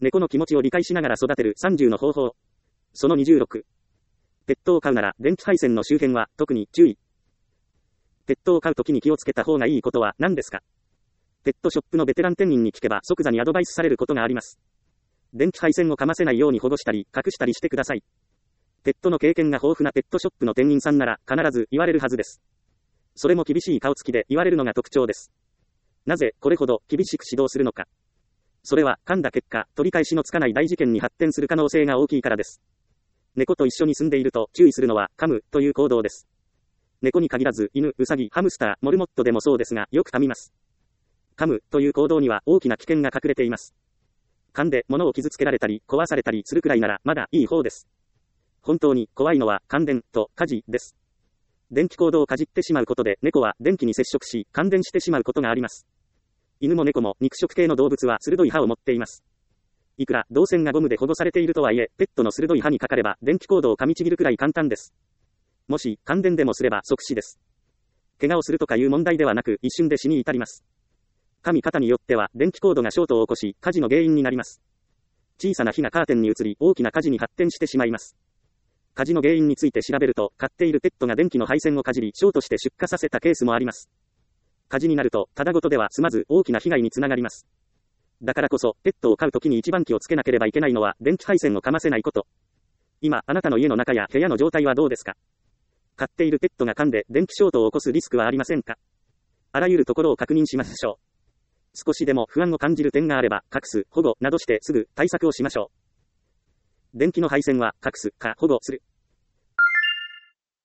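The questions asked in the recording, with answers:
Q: ペットを飼うときに気をつけた方がいいことは何ですか?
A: 電気配線を噛ませないこと(隠すか保護する)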